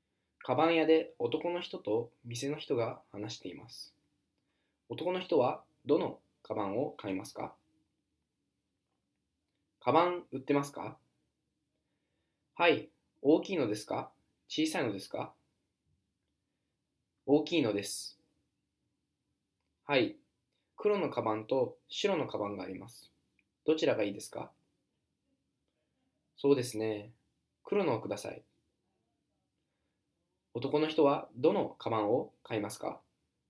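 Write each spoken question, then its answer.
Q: 男の人はどのカバンを買いますか?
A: 大きい黒のカバン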